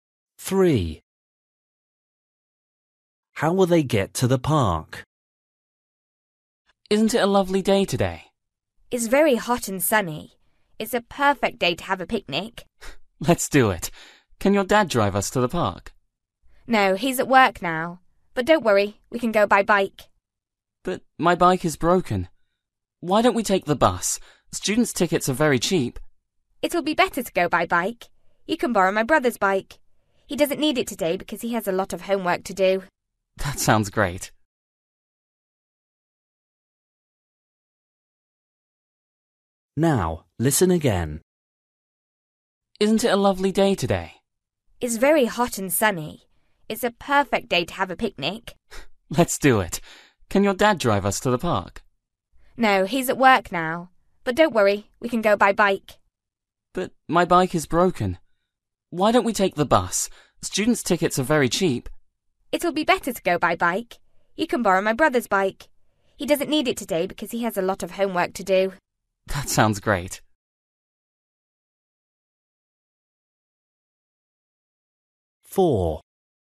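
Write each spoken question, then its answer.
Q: How will they get to the park?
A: by bike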